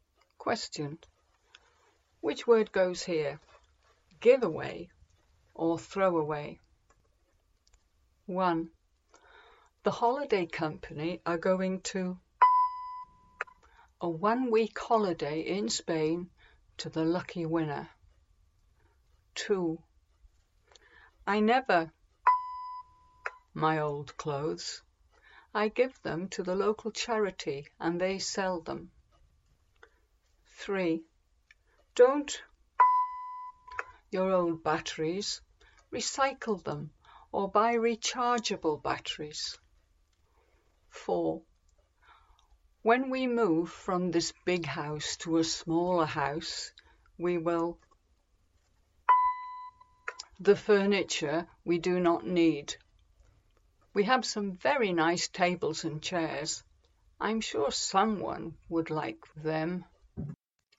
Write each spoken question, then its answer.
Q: The holiday company are going to a one week holiday in Spain to the lucky winner.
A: The holiday company are going to give away a one week holiday in Spain to the lucky winner.

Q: I never my old clothes.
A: I never throw away my old clothes.

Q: Don't your old batteries, recycle them or buy rechargeable batteries.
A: Don't throw away your old batteries, recycle them or buy rechargeable batteries.

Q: When we move from this big house to a smaller house, we will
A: When we move from this big house to a smaller house, we will give away the furniture we do not need.